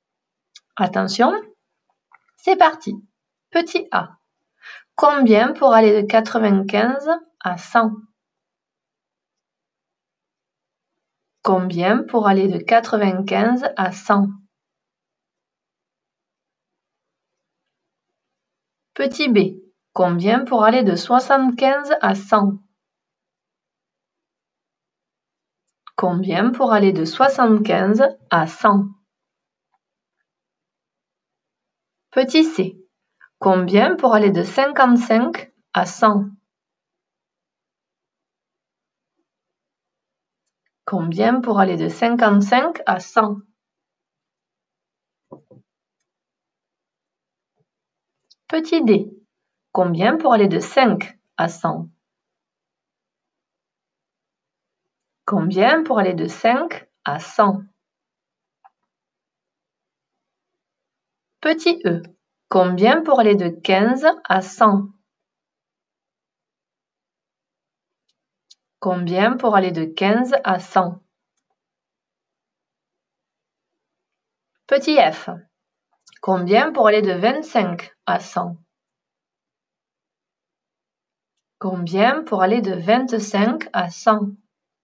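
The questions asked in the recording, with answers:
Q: Combien pour aller de 75 à 100?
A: 25

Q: Combien pour aller de 55 à 100?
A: 45

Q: Combien pour aller de 5 à 100?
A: 95

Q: Combien pour aller de 15 à 100?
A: 85

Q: Combien pour aller de 25 à 100?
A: 75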